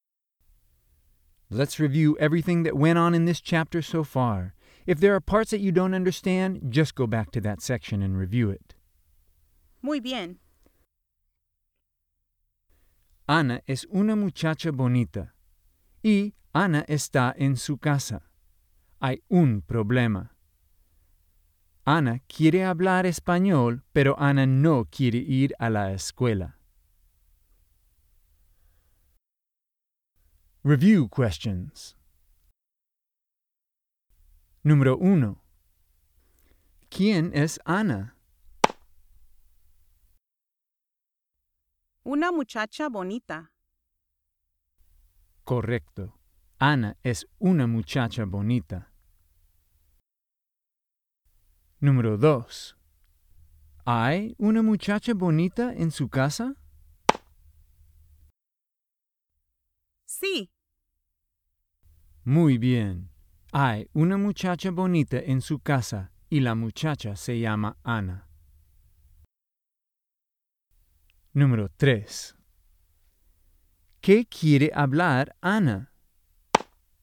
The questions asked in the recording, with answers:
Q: ¿Quién es Ana?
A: Una muchacha bonita.

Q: ¿Hay una muchacha bonita en su casa?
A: Sí.

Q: ¿Qué quiere hablar Ana?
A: El español.